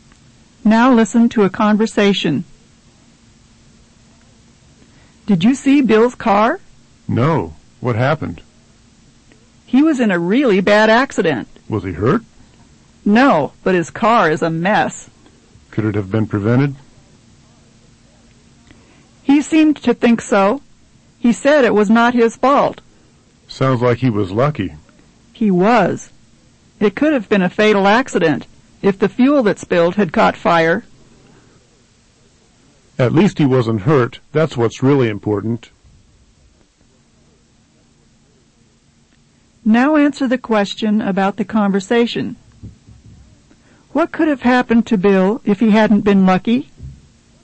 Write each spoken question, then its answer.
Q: What could have happened to Bill if he hadn't been lucky?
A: he could have been killed.